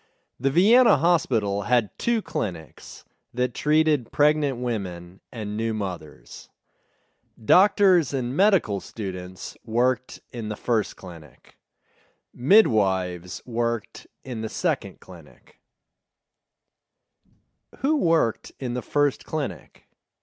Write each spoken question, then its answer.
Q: Who worked in the first clinic?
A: Doctors and medical students worked in the first clinic.